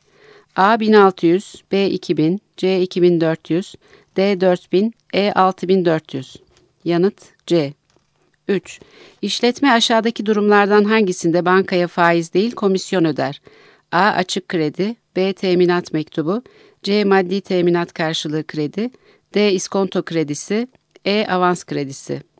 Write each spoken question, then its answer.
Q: İşletme aşağıdaki durumlardan hangisinde bankaya faiz değil komisyon öder?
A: Yanıt B.